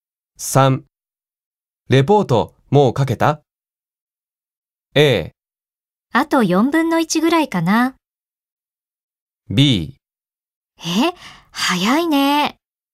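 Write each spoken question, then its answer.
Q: レポートもう書けた ?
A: A: あと4分の1ぐらいかな。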